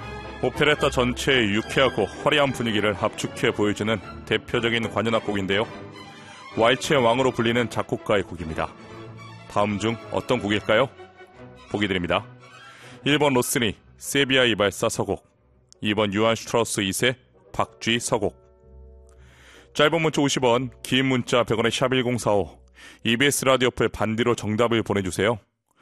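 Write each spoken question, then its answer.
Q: 왈츠의 왕으로 불리는 작곡가의 곡입니다. 다음 중 어떤 곡일까요?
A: 2번: 요한 슈트라우스 2세, 박쥐 서곡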